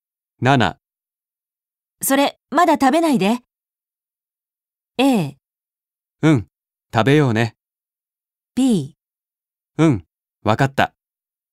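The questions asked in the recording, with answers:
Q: それ、まだ食べないで。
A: B: うん、わかった。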